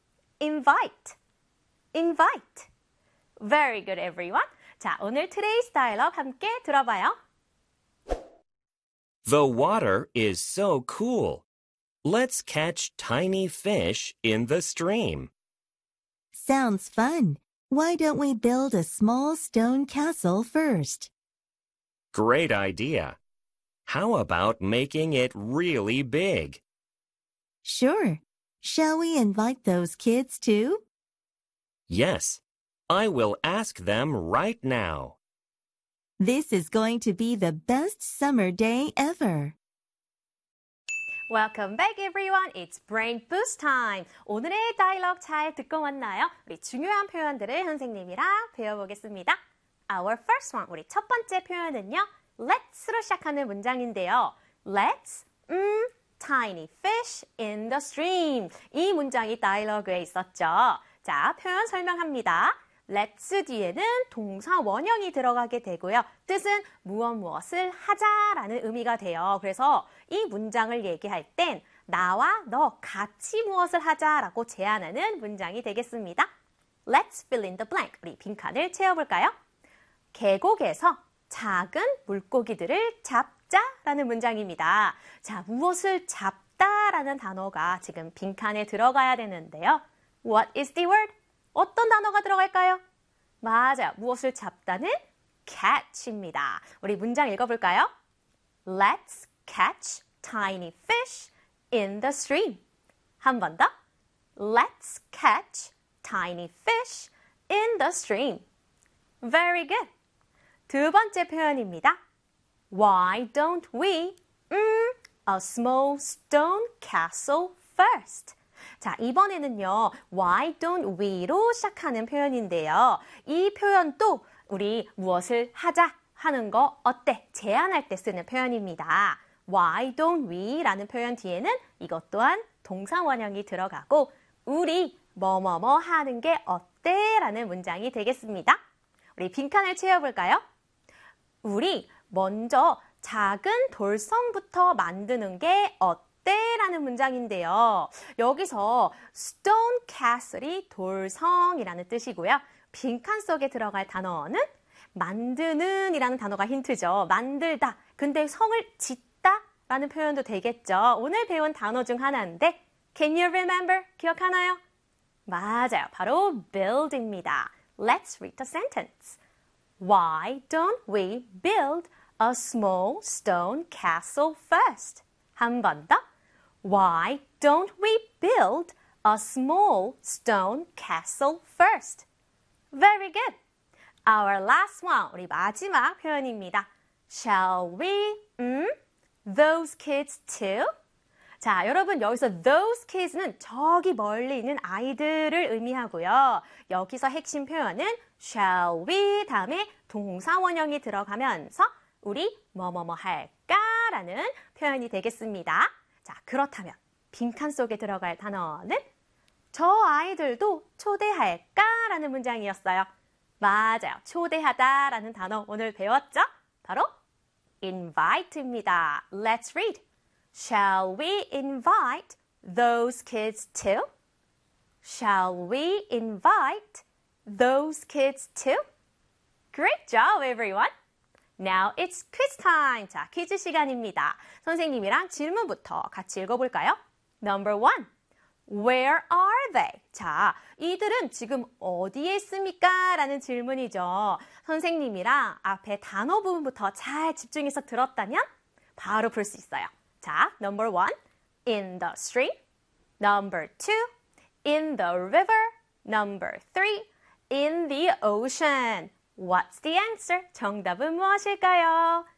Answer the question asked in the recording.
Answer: The answer is number one in the stream.